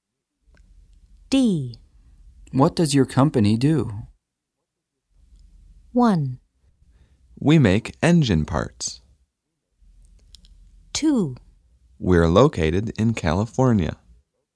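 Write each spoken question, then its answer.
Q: What does your company do?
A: 1: We make engine parts.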